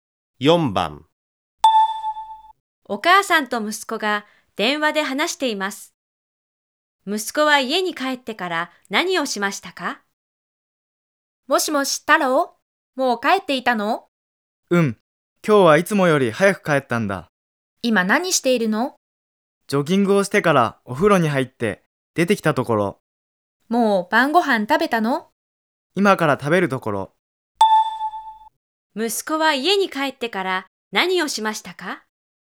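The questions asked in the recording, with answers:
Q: 息子は家に帰ってから何をしましたか?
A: ジョギングをしてからお風呂に入った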